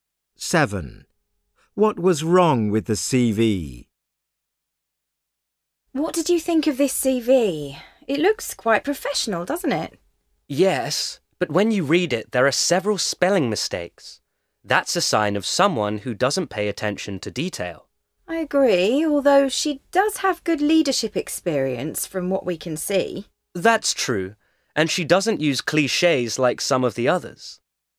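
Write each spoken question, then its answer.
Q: What was wrong with the CV?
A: it had several spelling mistakes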